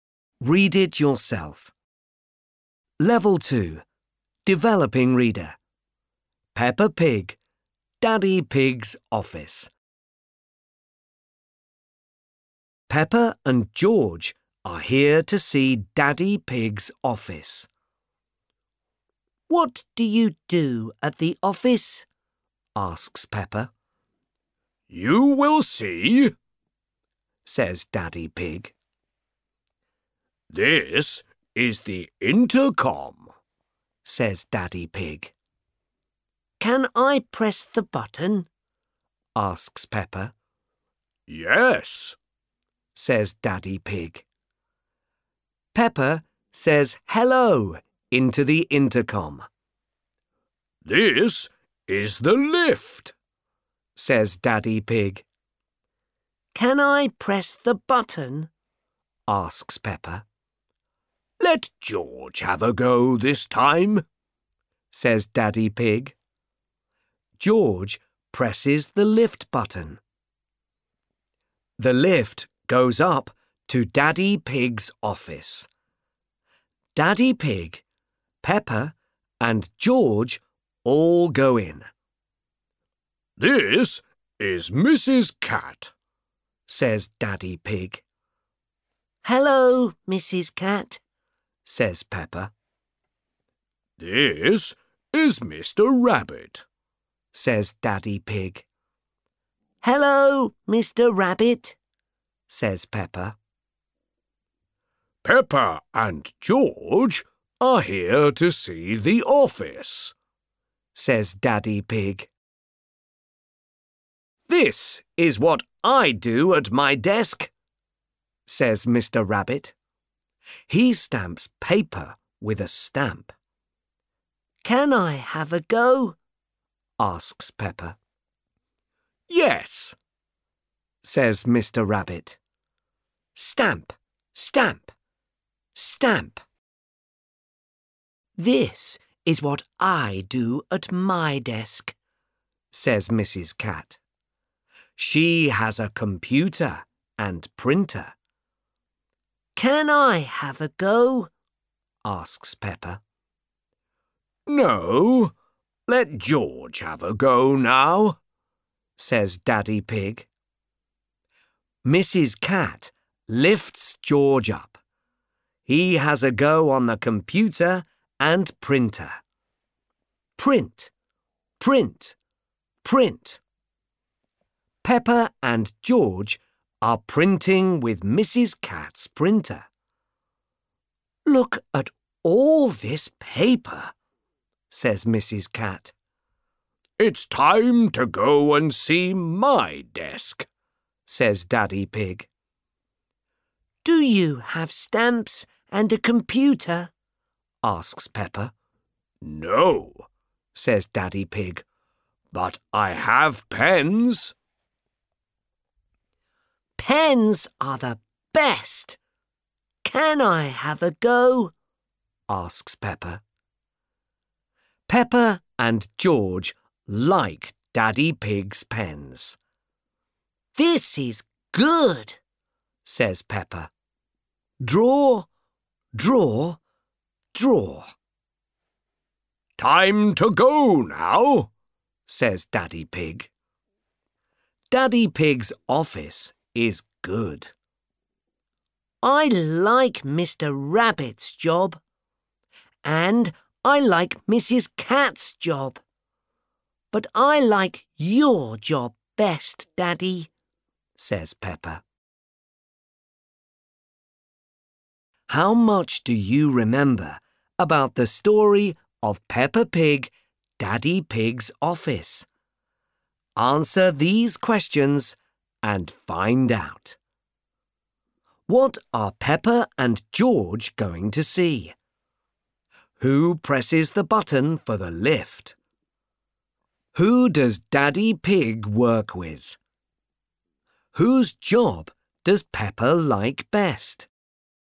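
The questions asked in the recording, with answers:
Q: What are Peppa and George going to see?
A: Daddy Pig's office

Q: Who presses the button for the lift?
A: George

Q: Who does Daddy Pig work with?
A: Mrs. Cat and Mr. Rabbit

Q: Whose job does Peppa like best?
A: Daddy Pig's job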